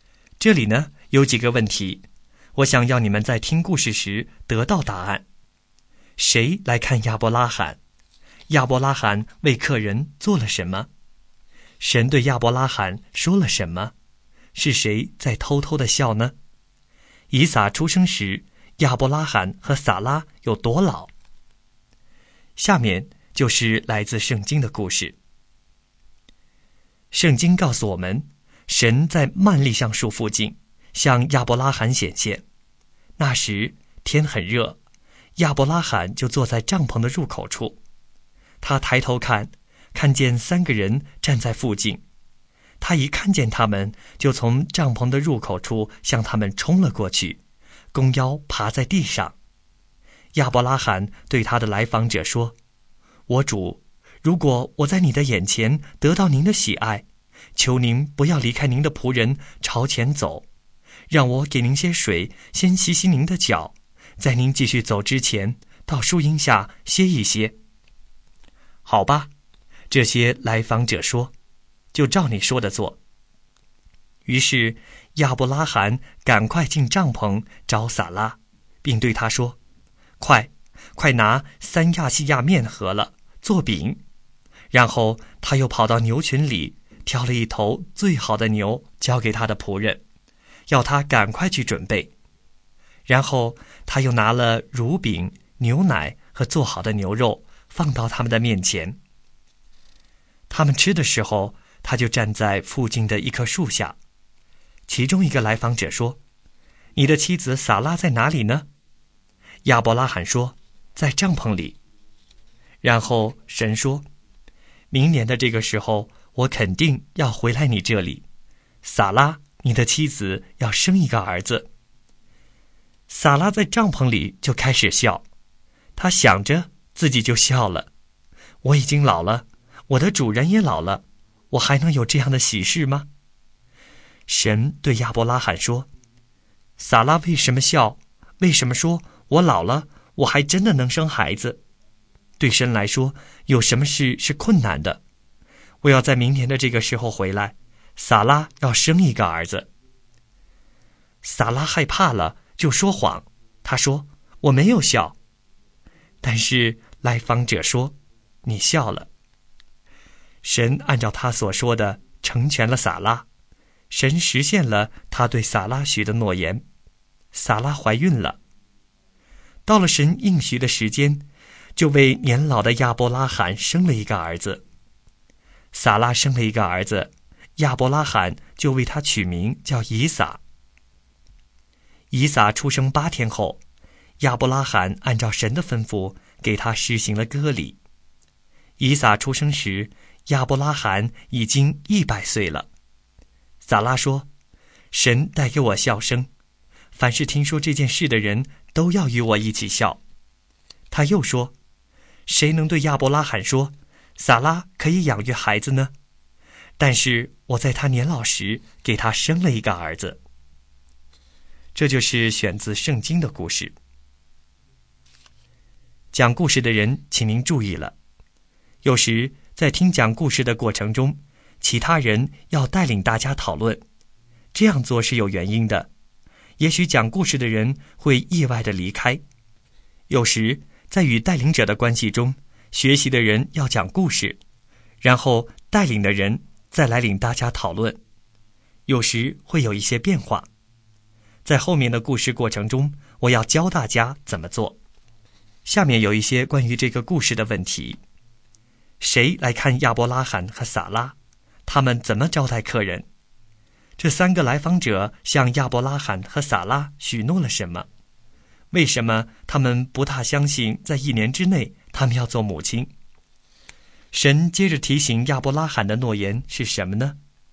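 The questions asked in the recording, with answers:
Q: 谁来看亚伯拉罕?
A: 三个天堂的来访者(神)

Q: 亚伯拉罕为客人做了什么?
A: 给他们水洗脚,请他们在树下歇息,预备饼、牛肉、乳饼和牛奶给他们吃

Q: 神对亚伯拉罕说了什么?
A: 明年这个时候撒拉要生一个儿子

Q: 是谁在偷偷的笑呢?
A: 撒拉

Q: 以撒出生时,亚伯拉罕和撒拉有多老?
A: 亚伯拉罕100岁,两人都年老了

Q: 谁来看亚伯拉罕和撒拉?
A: 三个来访者(神)

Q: 他们怎么招待客人?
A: 给水洗脚,预备饼、牛肉、乳饼和牛奶

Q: 这三个来访者向亚伯拉罕和撒拉许诺了什么?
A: 明年这个时候撒拉要生一个儿子

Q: 为什么他们不大相信在一年之内他们要做母亲?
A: 因为他们都已经老了

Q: 神接着提醒亚伯拉罕的诺言是什么呢?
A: 对神来说没有难成的事,明年这个时候撒拉要生一个儿子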